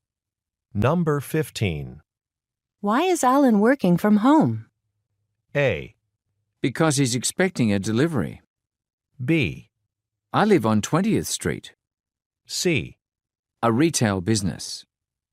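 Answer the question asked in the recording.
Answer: A: Because he's expecting a delivery.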